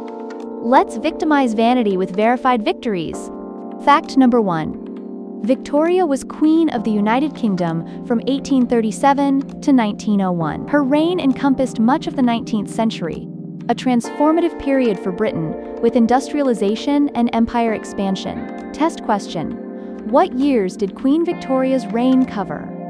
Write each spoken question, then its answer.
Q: what years did Queen Victoria's reign cover?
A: 1837 to 1901.